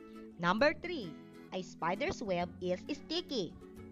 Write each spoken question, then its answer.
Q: A spider's web is sticky.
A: Fact again.